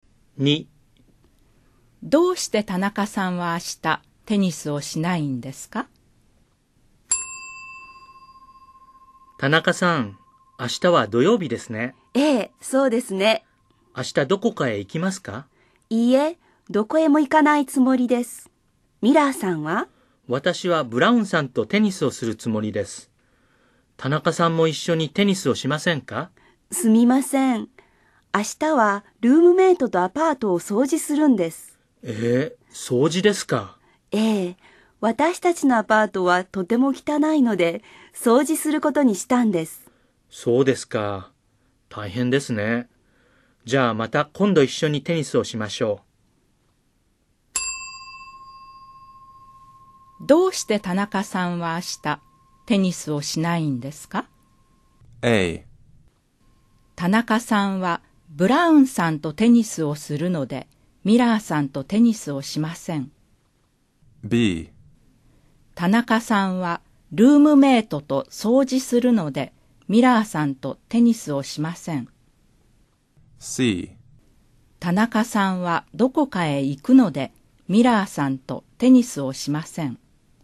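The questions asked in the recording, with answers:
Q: どうして田中さんは明日テニスをしないんですか?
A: B: 田中さんはルームメイトと掃除するのでミラーさんとテニスをしません。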